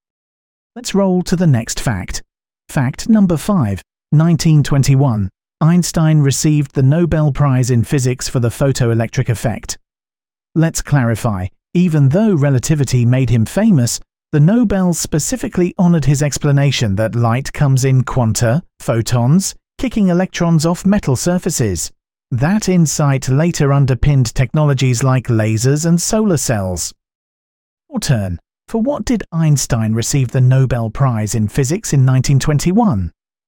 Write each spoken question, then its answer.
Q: For what did Einstein receive the Nobel Prize in Physics in 1921?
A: the photoelectric effect.